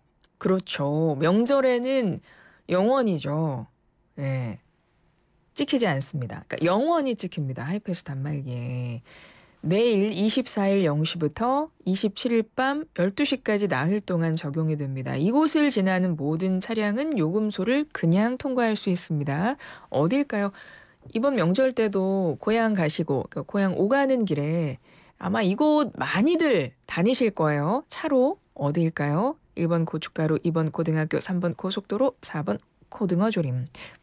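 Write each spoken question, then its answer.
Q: 차로 어딜까요? 1번 고춧가루, 2번 고등학교, 3번 고속도로, 4번 고등어조림.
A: 3: 고속도로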